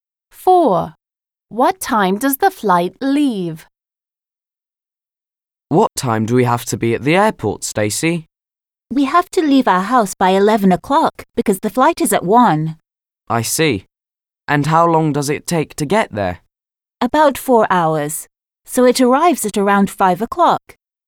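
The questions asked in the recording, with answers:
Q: What time does the flight leave?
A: At 1 o'clock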